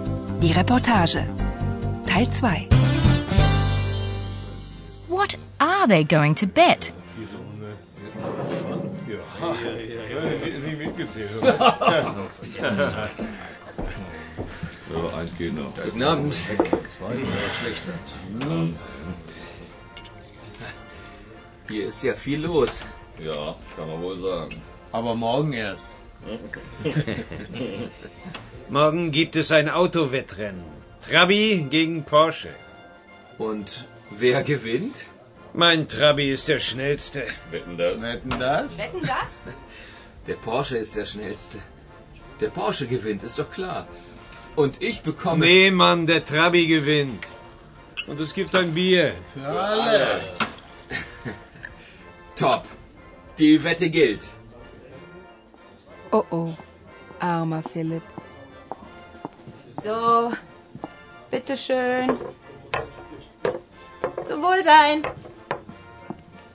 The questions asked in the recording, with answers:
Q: What are they going to bet?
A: says what the prize will be a beer all round.